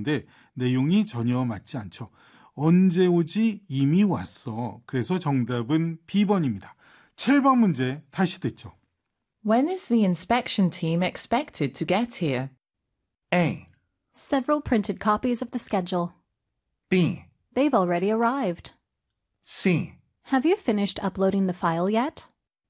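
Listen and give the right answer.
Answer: B: They've already arrived.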